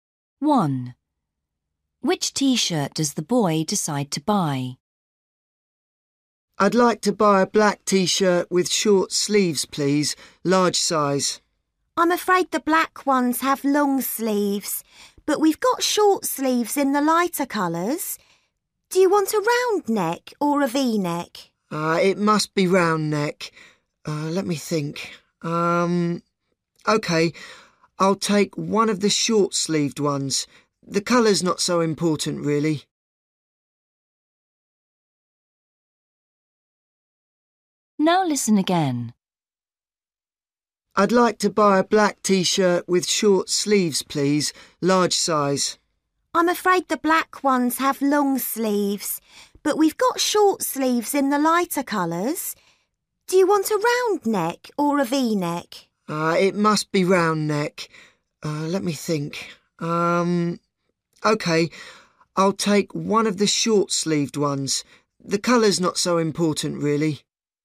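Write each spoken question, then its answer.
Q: Which T-shirt does the boy decide to buy?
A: A short-sleeved, round-neck T-shirt in a light colour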